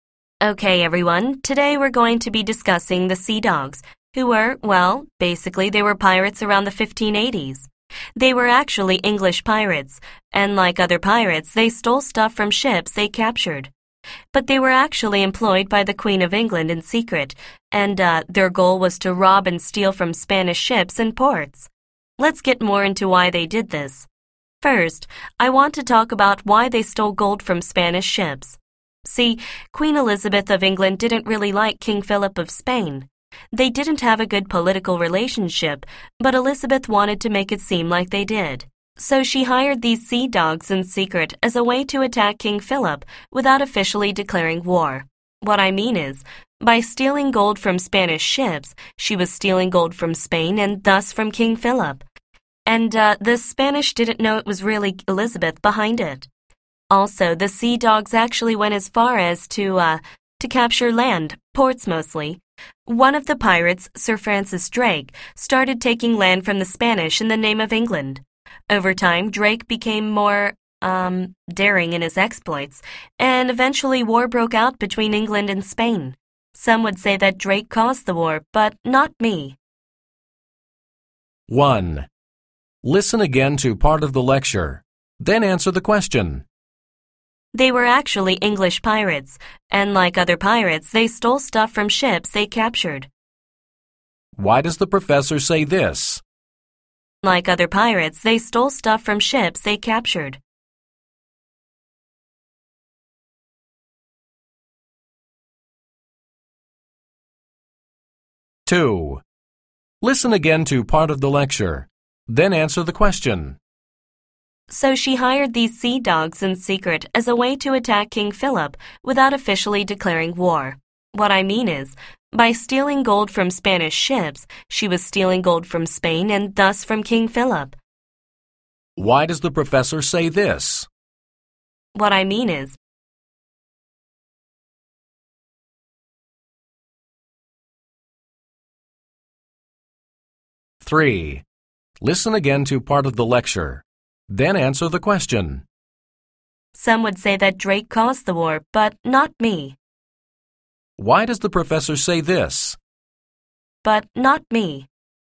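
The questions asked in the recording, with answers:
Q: Why does the professor say this?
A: To explain how hiring the sea dogs let Elizabeth attack King Philip: stealing gold from Spanish ships meant stealing from Spain and Philip

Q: Why does the professor say this?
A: To show that she does not agree that Drake caused the war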